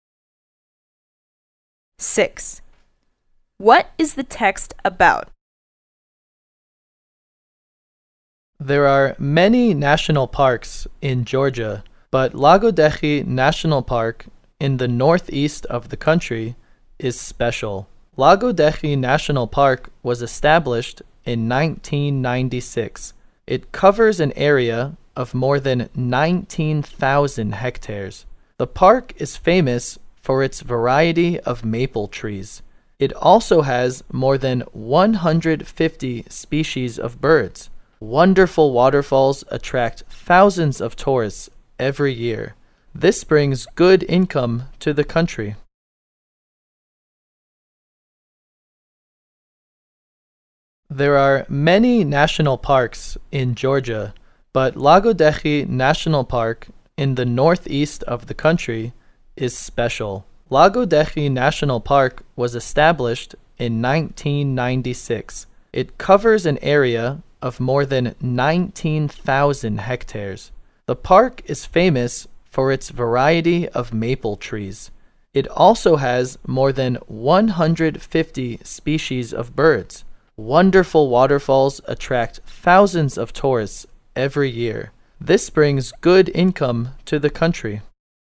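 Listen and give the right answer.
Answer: Lagodekhi National Park in Georgia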